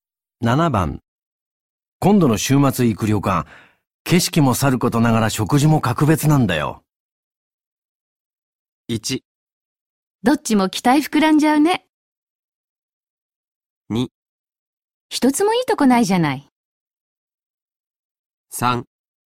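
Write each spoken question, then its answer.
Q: 今度の週末行く旅館、景色もさることながら食事も格別なんだよ。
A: 1: どっちも期待膨らんじゃうね。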